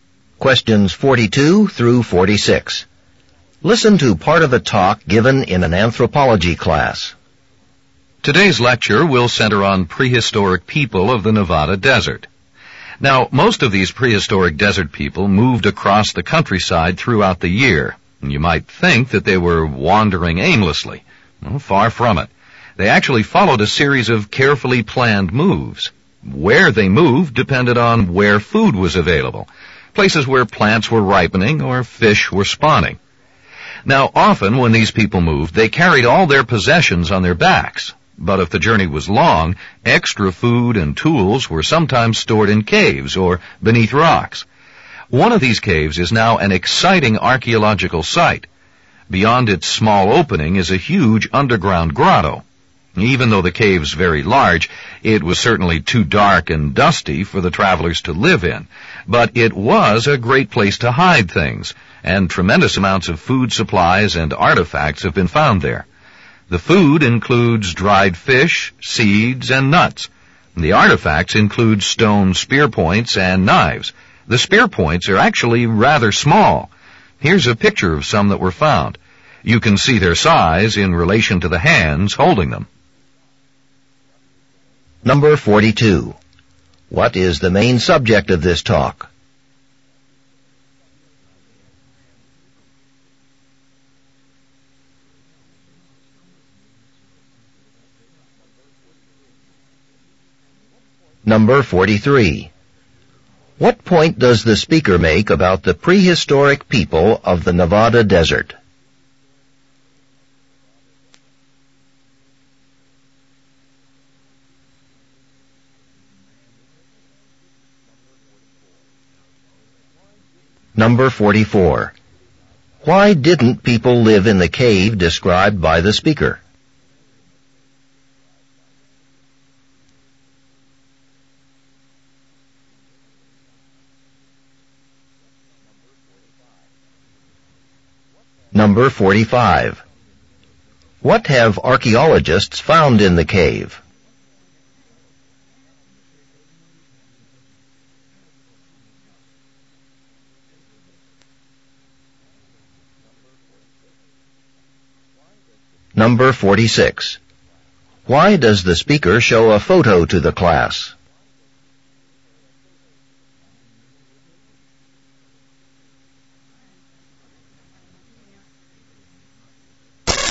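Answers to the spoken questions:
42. Prehistoric people of the Nevada desert
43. They moved according to carefully planned routes, following available food
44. It was too dark and dusty
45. Food supplies and artifacts such as dried fish, seeds, nuts, spear points and knives
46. To show how small the spear points are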